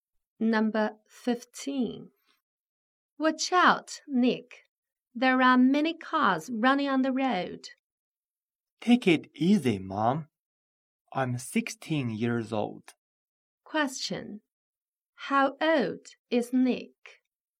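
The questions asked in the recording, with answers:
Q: How old is Nick?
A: 16 years old.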